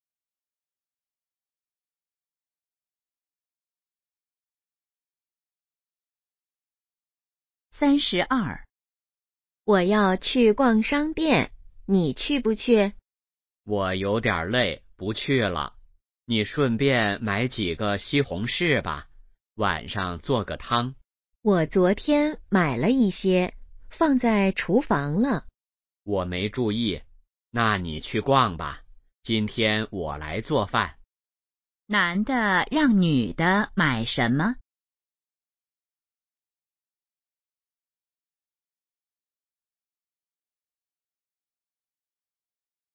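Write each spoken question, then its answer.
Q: 男的让女的买什么?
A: 西红柿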